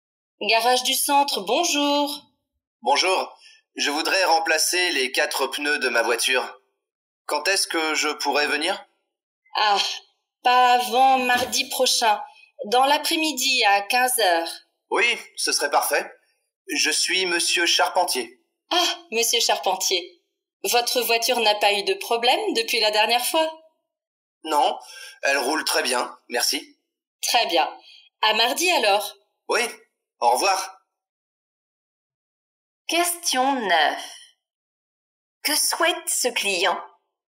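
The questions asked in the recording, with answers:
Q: Que souhaite ce client?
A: Remplacer les quatre pneus de sa voiture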